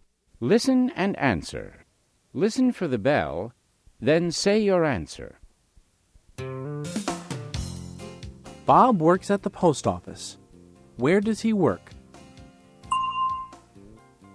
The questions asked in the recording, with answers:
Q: Where does he work?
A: He works at the post office.